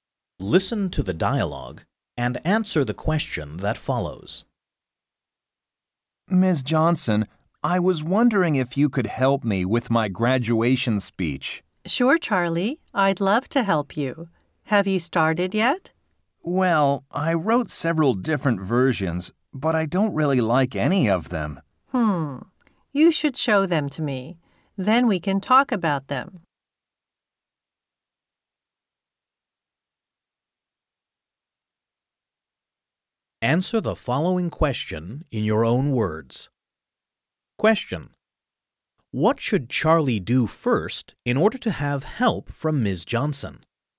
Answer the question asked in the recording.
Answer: he should show her the different versions that he wrote.